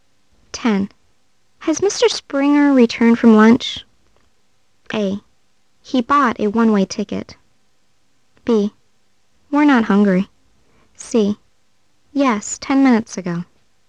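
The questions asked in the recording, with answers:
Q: Has Mr. Springer returned from lunch?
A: C: Yes, 10 minutes ago.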